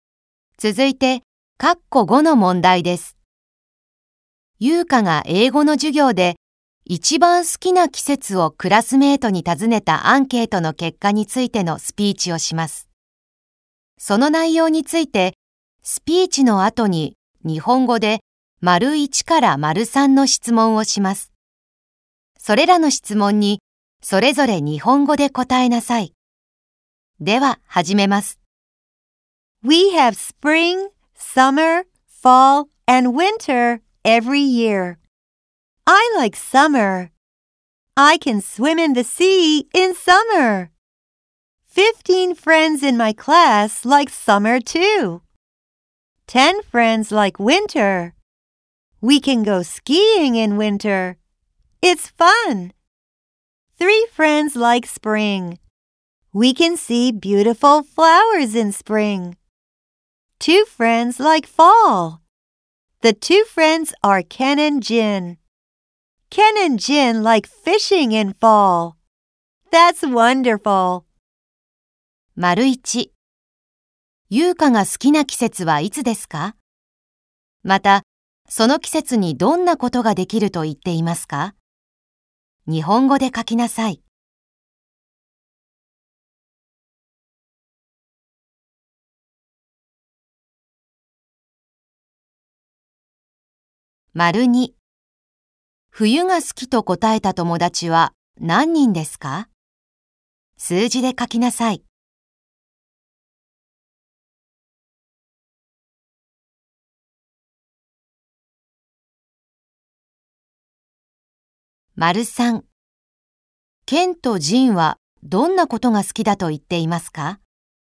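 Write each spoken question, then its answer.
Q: 優香が好きな季節はいつですか?また、その季節にどんなことができると言っていますか?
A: 夏。海で泳ぐことができる。

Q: 冬が好きと答えた友達は何人ですか?数字で書きなさい。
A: 10人

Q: ケンとジンはどんなことが好きだと言っていますか?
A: 秋に釣りをすること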